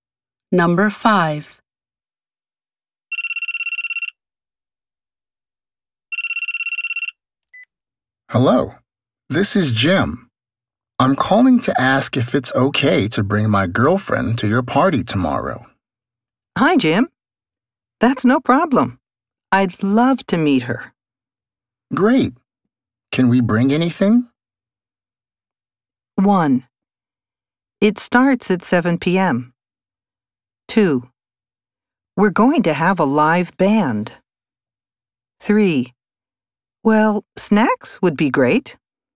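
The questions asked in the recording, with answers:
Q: Great. Can we bring anything?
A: 3: Well, snacks would be great.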